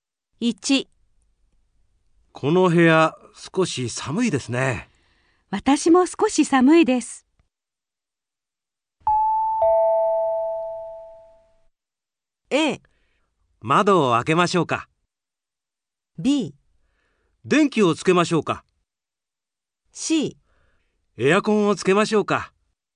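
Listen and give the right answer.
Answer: C: エアコンをつけましょうか。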